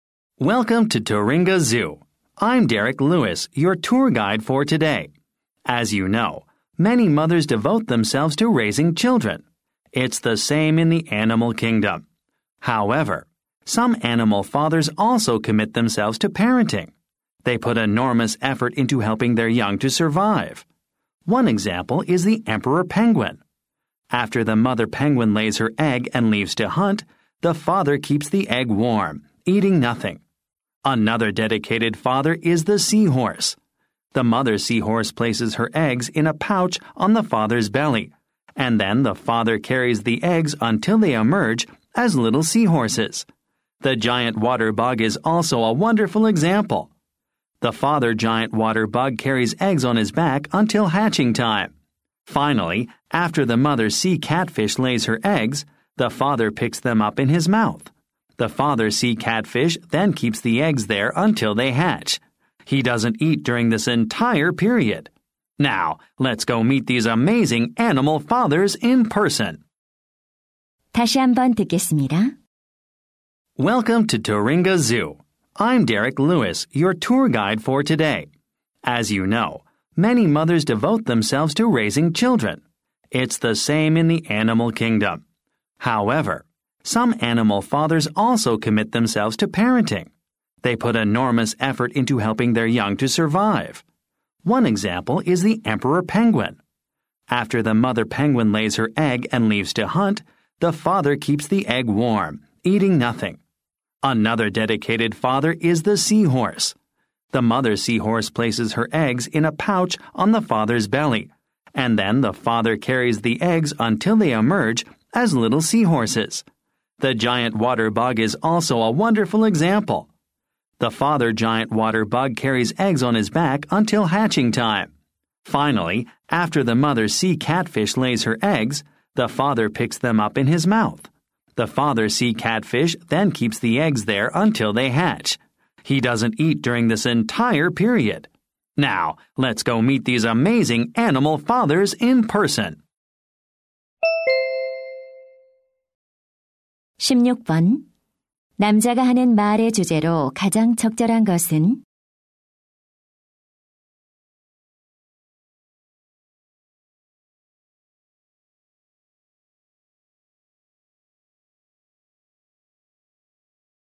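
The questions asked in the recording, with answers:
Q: 남자가 하는 말의 주제로 가장 적절한 것은?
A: 새끼 양육에 헌신하는 동물 아빠들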